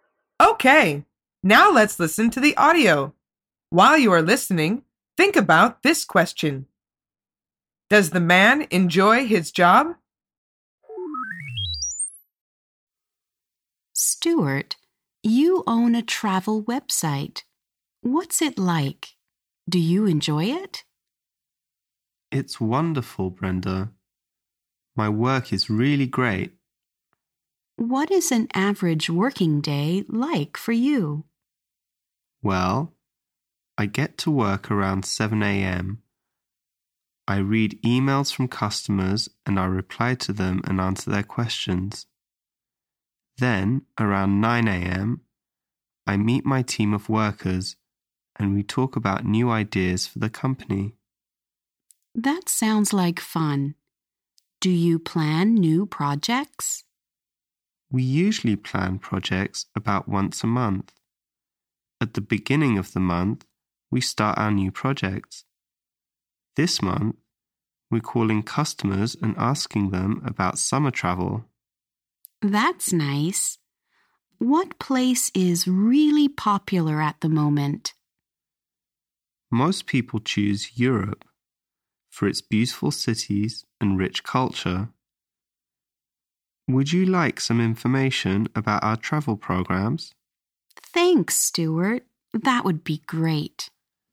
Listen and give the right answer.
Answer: The answer is yes. He says, "My work is really great."